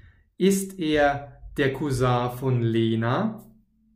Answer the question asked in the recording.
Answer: Nein, sondern von Tom. Er ist der Cousin von Tom.